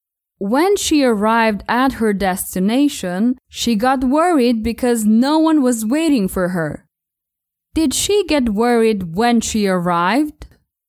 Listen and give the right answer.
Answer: Yes, she got worried when she arrived.